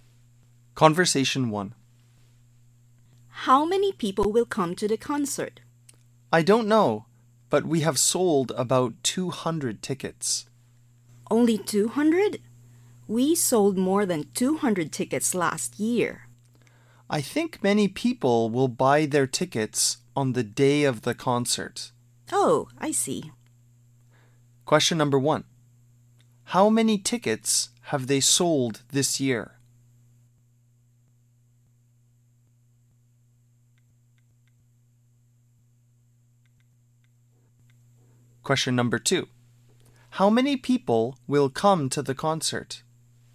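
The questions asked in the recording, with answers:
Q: How many tickets have they sold this year?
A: About 200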